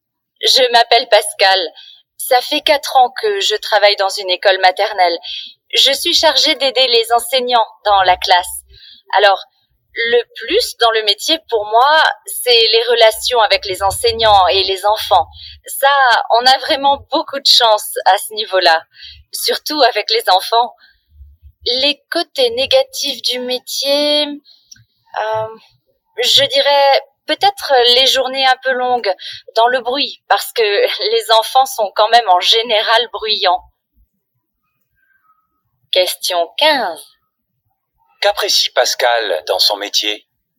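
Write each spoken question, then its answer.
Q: Qu'apprécie Pascal dans son métier ?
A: Les relations avec les enseignants et les enfants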